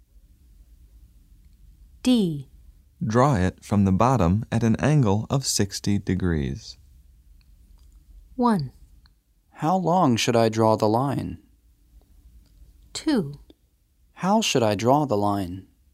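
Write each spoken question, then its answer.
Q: Draw it from the bottom at an angle of 60 degrees.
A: 2: How should I draw the line?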